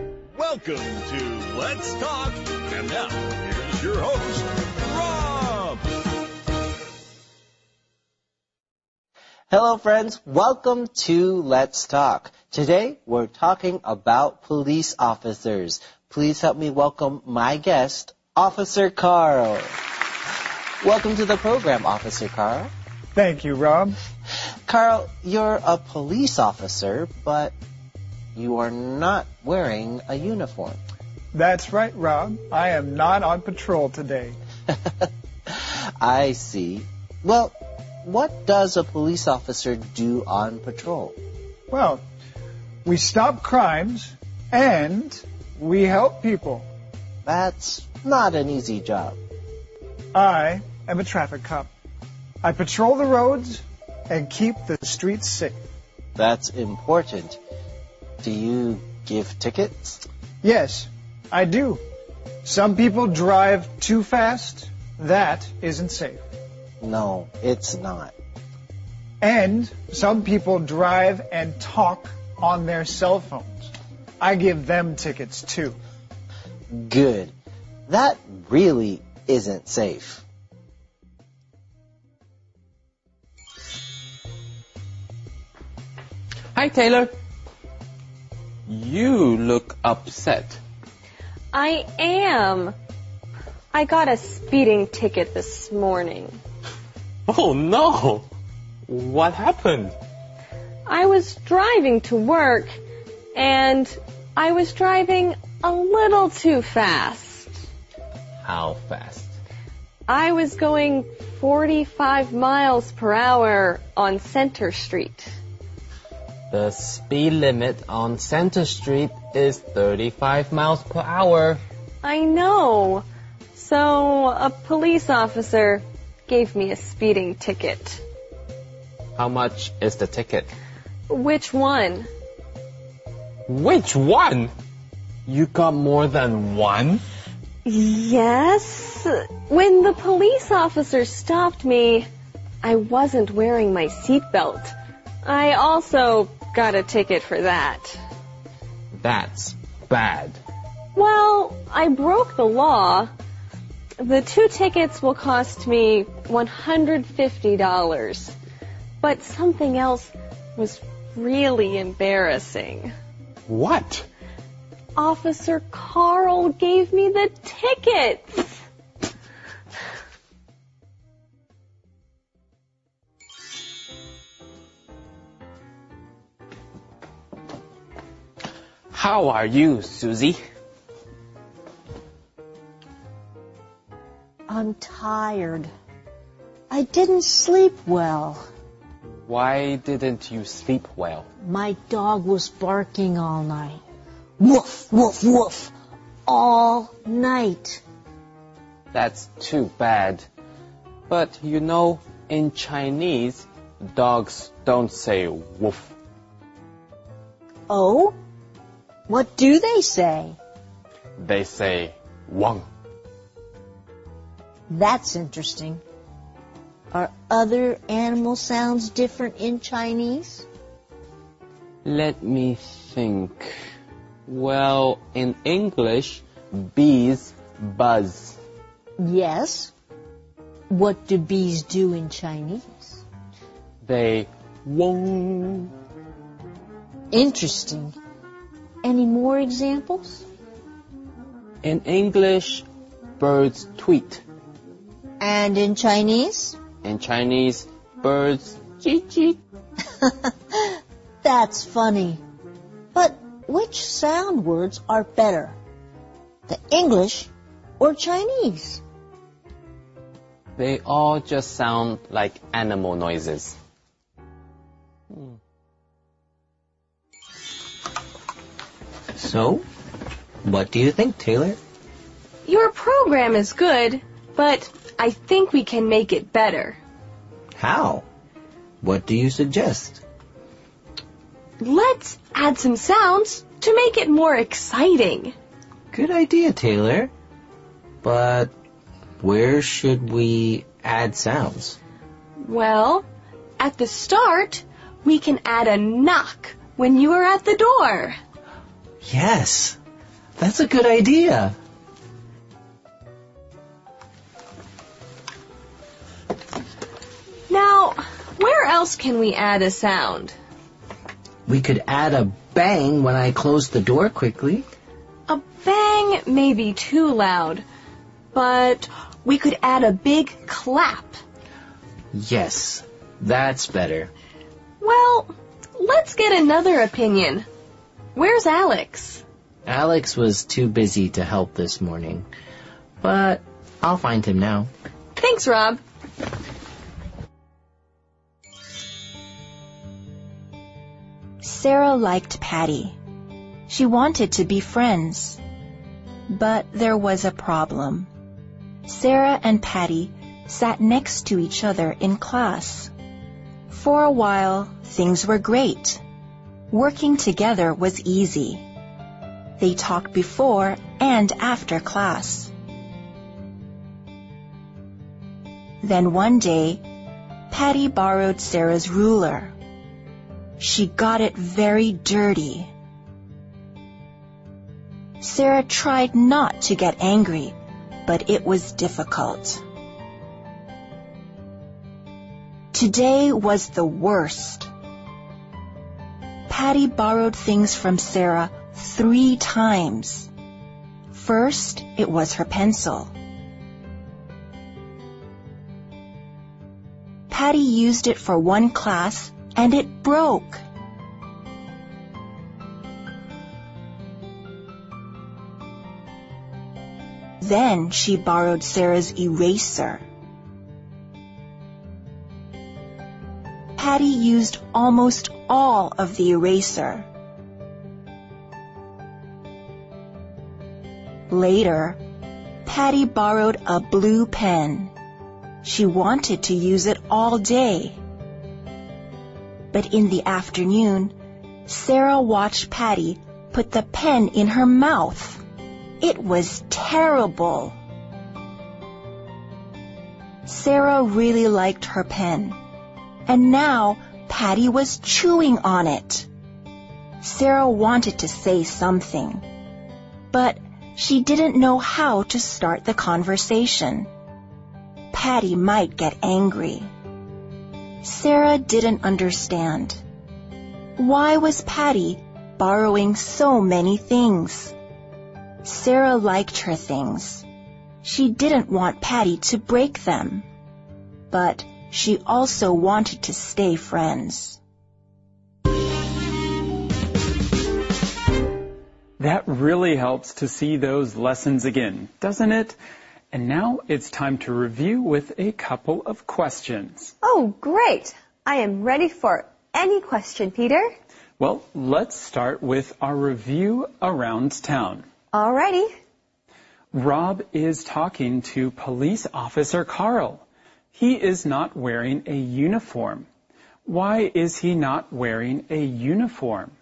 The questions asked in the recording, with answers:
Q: Why is he not wearing a uniform?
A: He's not on patrol.